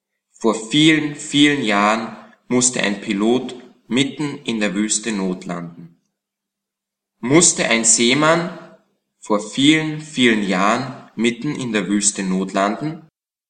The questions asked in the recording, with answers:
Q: Musste ein Seemann vor vielen, vielen Jahren mitten in der Wüste notlanden?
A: Nein, kein Seemann musste mitten in der Wüste notlanden.